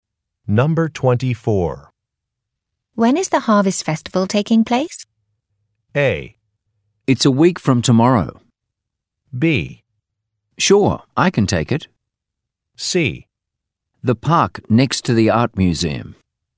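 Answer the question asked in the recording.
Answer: A: It's a week from tomorrow.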